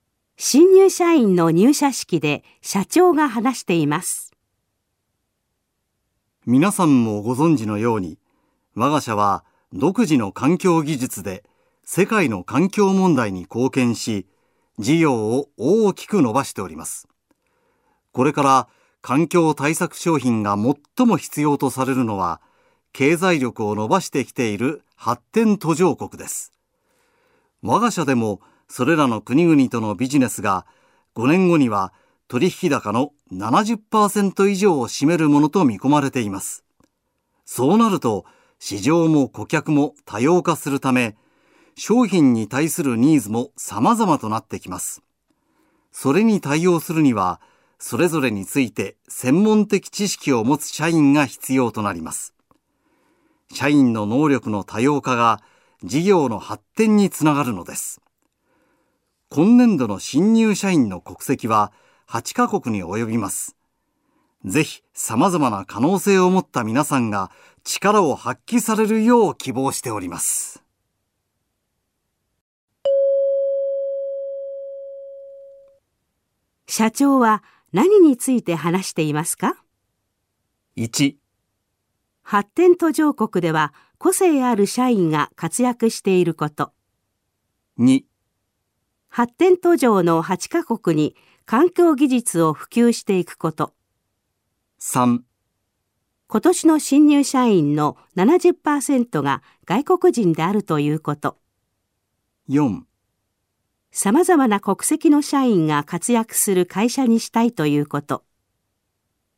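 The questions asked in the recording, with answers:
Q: 社長は何について話していますか?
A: 4: 様々な国籍の社員が活躍する会社にしたいということ。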